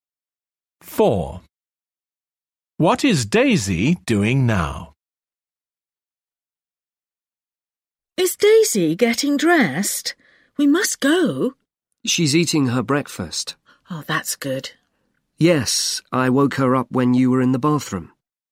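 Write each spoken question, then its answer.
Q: What is Daisy doing now?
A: Eating her breakfast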